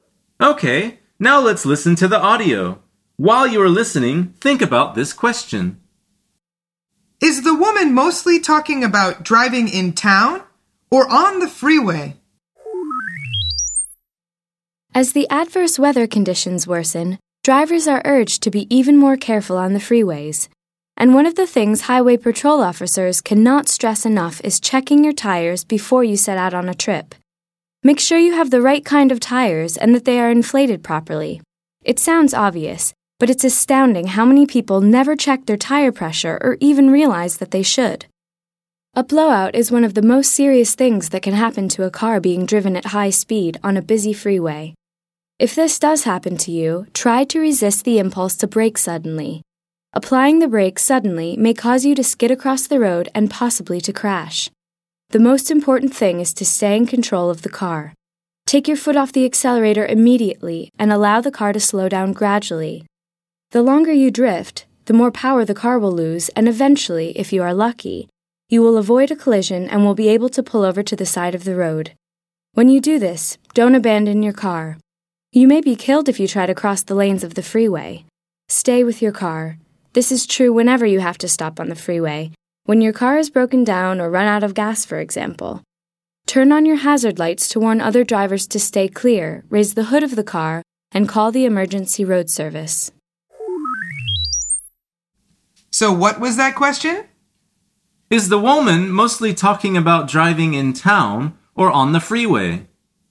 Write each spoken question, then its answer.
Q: Is the woman mostly talking about driving in town or on the freeway?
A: The answer is on the freeway.